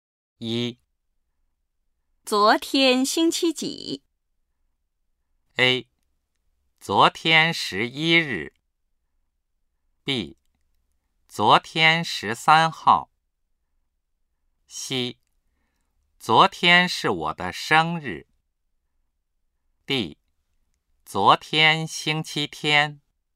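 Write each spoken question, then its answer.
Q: 昨天星期几?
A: D: 昨天星期天。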